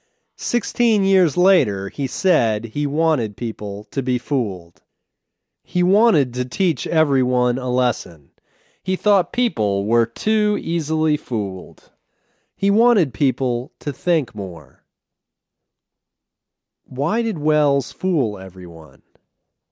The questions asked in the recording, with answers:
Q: Why did Welles fool everyone?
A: He fooled everyone because he wanted them to think more.